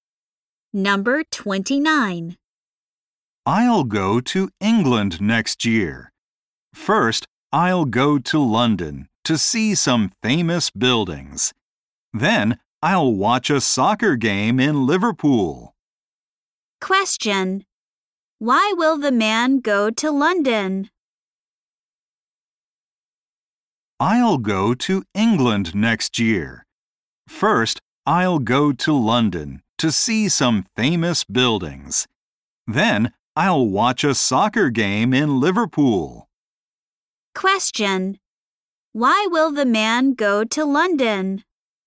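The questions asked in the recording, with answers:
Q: Why will the man go to London?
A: To see some famous buildings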